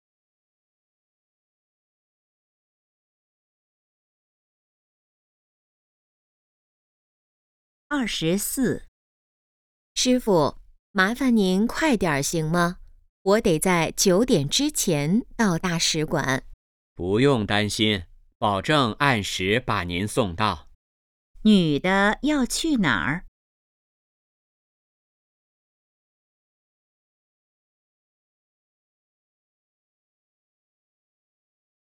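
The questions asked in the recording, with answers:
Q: 女的要去哪儿?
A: 大使馆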